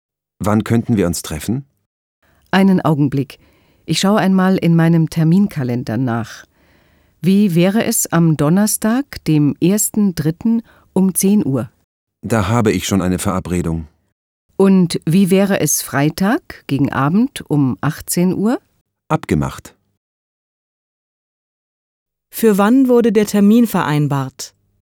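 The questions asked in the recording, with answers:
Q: Für wann wurde der Termin vereinbart?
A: Freitag gegen Abend, um 18 Uhr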